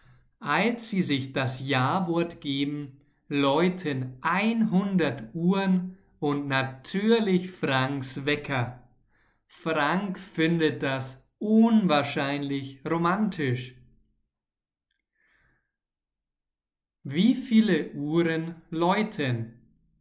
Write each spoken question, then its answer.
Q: Wie viele Uhren läuten?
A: 100. 100 Uhren läuten.